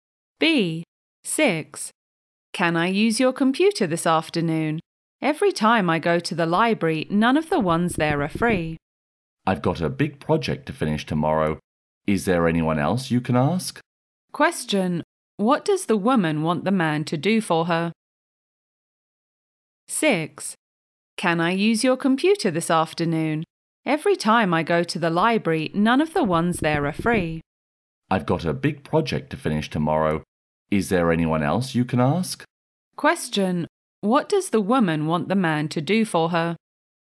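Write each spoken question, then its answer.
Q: What does the woman want the man to do for her?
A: Let her use his computer this afternoon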